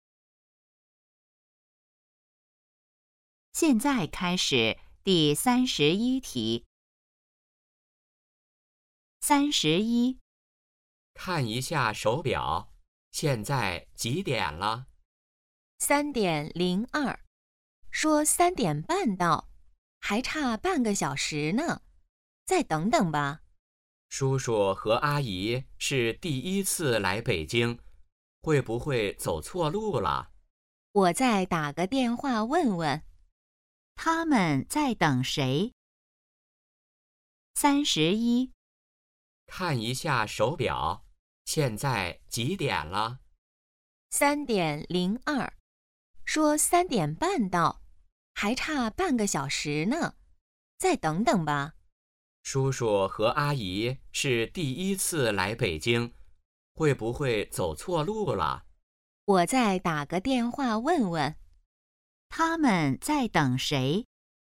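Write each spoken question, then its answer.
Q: 他们在等谁?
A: 叔叔和阿姨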